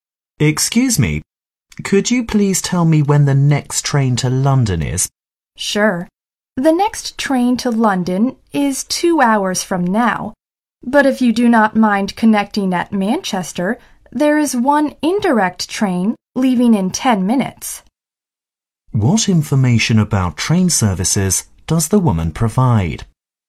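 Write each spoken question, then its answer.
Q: What information about train services does the woman provide?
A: The next direct train to London is in two hours, but an indirect train via Manchester leaves in 10 minutes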